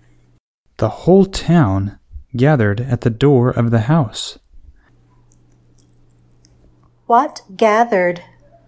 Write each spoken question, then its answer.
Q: What gathered?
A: The town gathered.